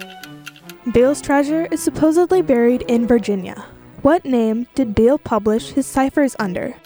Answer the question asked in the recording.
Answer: He published them under the name the Beale Papers, but they later became known as the Beale Ciphers.